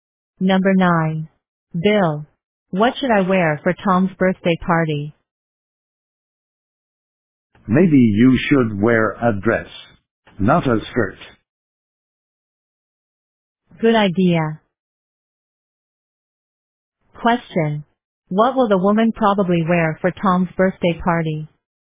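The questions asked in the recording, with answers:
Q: What will the woman probably wear for Tom's birthday party?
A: A dress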